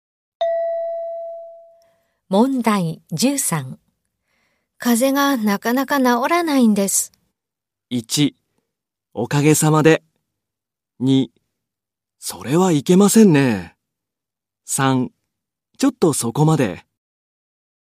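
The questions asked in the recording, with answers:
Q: 風邪がなかなか治らないんです。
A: 3: それはいけませんね。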